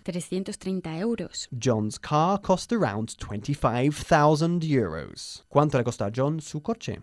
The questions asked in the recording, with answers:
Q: ¿Cuánto le costó a John su coche?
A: 25,000 euros.